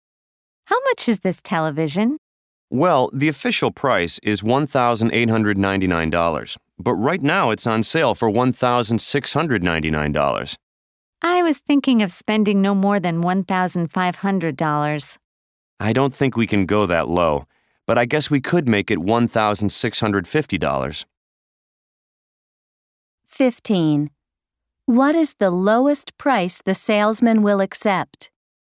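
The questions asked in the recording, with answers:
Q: What is the lowest price the salesman will accept?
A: $1,650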